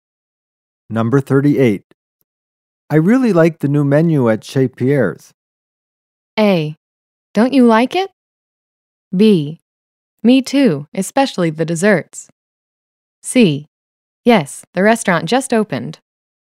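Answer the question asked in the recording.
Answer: B: Me too, especially the desserts.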